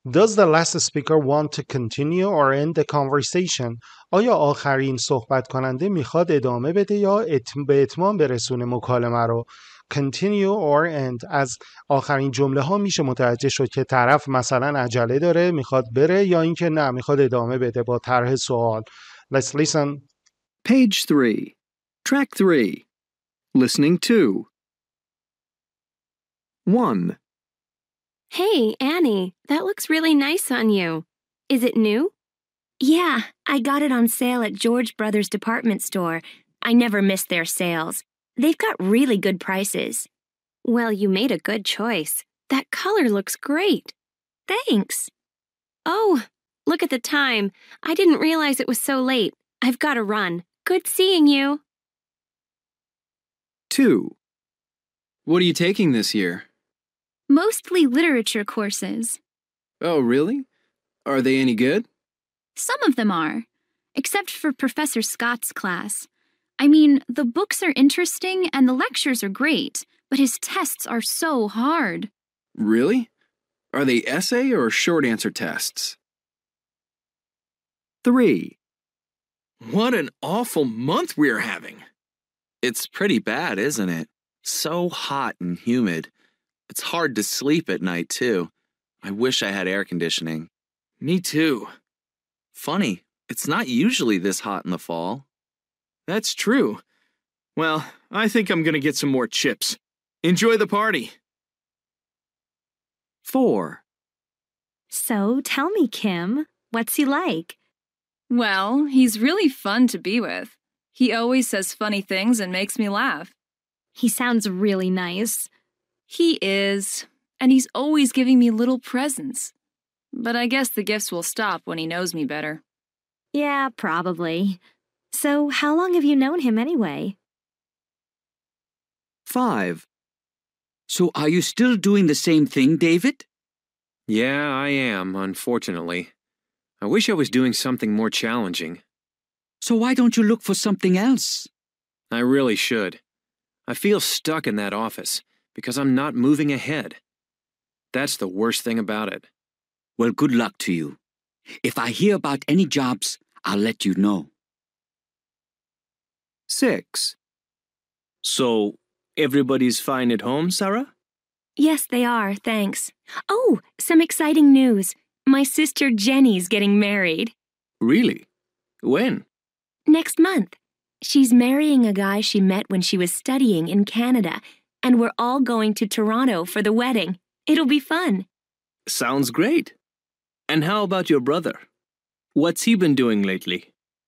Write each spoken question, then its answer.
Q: Does the last speaker want to continue or end the conversation?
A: One, end the conversation.

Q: Does the last speaker want to continue or end the conversation?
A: Two, continue the conversation.

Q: Does the last speaker want to continue or end the conversation?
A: 3, end.

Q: Does the last speaker want to continue or end the conversation?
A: 4, continue.

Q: Does the last speaker want to continue or end the conversation?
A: 5, end.

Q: Does the last speaker want to continue or end the conversation?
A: 6, continue.